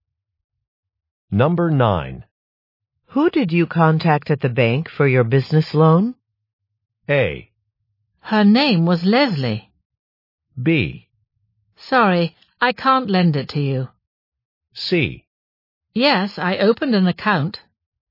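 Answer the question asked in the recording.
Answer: A: Her name was Leslie.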